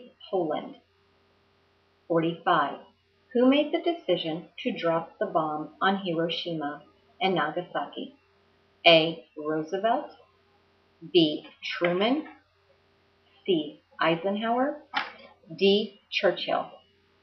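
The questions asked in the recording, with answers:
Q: Who made the decision to drop the bomb on Hiroshima and Nagasaki?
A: B: Truman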